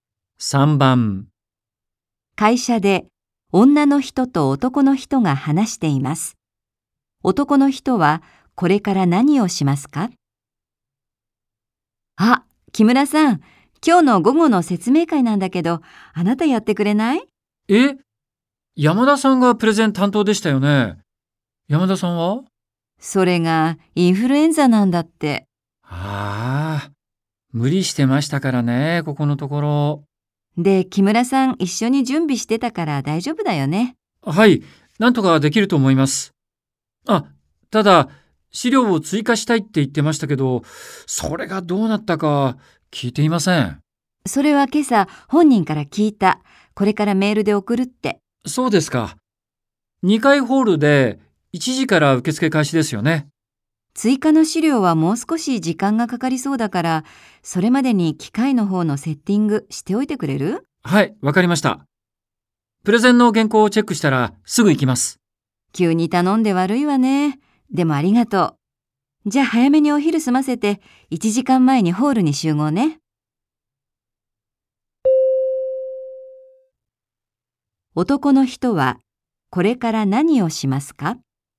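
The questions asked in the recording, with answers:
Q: 男の人はこれから何をしますか?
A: プレゼンの原稿をチェックする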